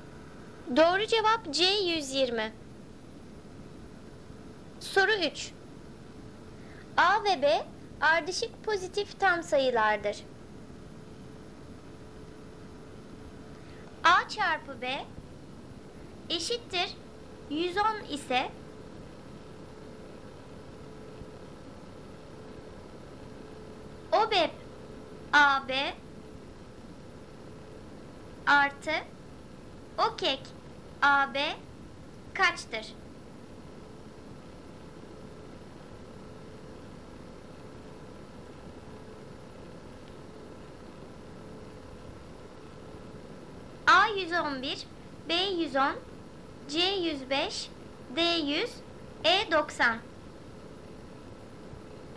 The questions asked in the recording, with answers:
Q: artı OKEK AB kaçtır?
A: Doğru cevap A 111.